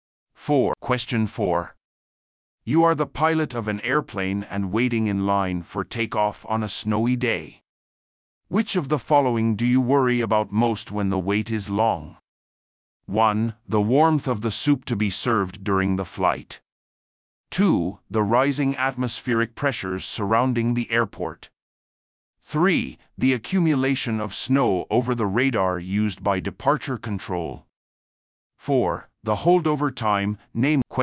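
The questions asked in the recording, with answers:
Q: Which of the following do you worry about most when the wait is long?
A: 4: The holdover time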